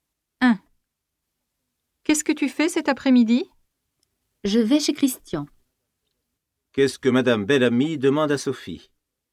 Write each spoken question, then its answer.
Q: Qu'est-ce que Madame Bellamy demande à Sophie?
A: Elle lui demande ce qu'elle fait cet après-midi.